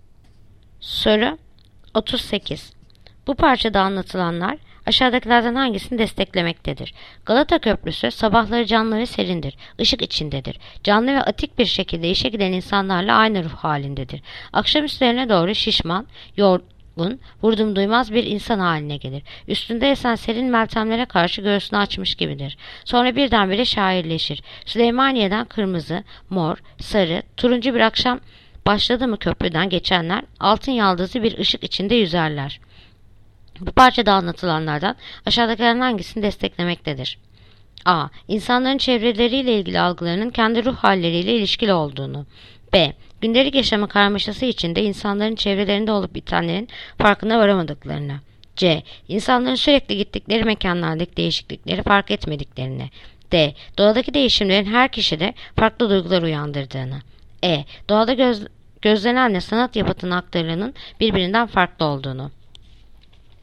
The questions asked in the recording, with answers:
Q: Bu parçada anlatılanlar aşağıdakilerden hangisini desteklemektedir?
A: Yanıt: Adana. İnsanların çevreleriyle ilgili algılarının kendi ruh halleriyle ilişkili olduğu.